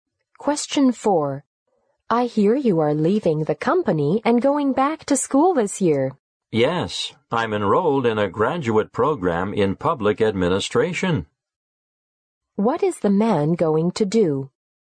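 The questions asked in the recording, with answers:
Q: What is the man going to do?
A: Go back to school for a graduate program in public administration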